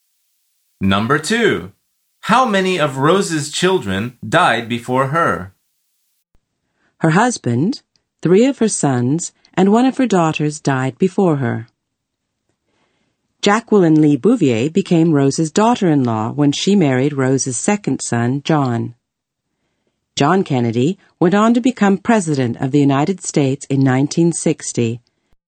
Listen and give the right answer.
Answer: The answer is 4. The speaker says 3 of her sons and 1 of her daughters died before her.